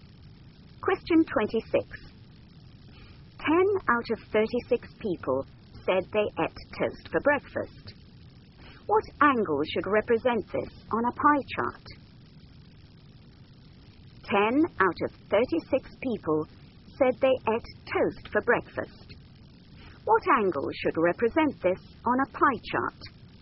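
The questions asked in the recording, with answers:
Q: What angle should represent this on a pie chart?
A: 100 degrees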